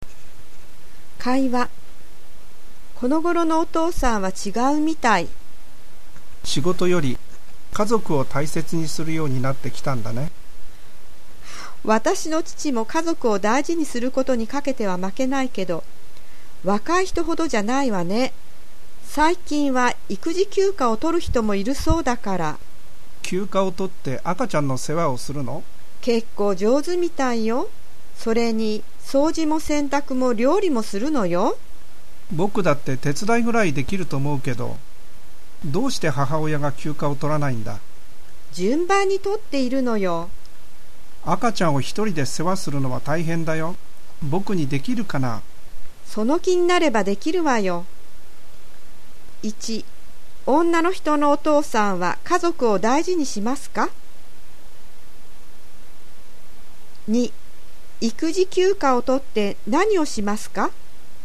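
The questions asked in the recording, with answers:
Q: 女の人のお父さんは家族を大事にしますか?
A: はい、大事にします(でも若い人ほどではない)

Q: 育児休暇を取って何をしますか?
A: 赤ちゃんの世話をする(掃除、洗濯、料理も)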